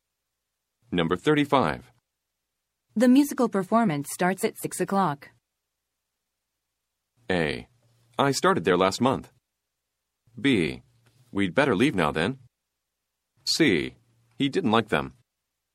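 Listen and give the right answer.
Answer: B: We'd better leave now then.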